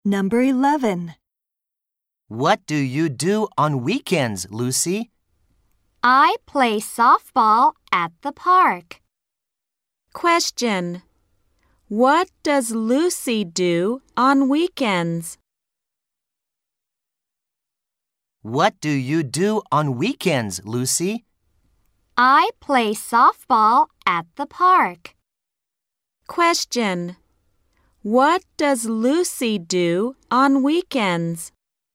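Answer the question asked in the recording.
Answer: She plays softball at the park.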